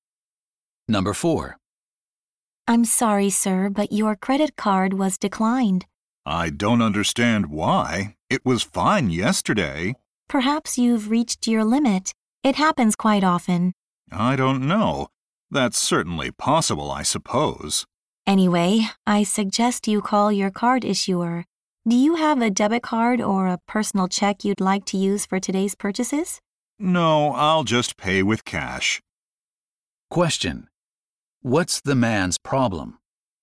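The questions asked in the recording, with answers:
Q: What's the man's problem?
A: His credit card was declined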